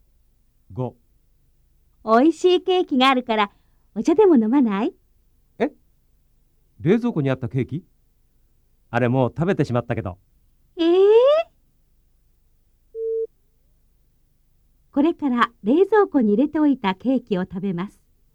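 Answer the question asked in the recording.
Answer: いいえ(正しくない)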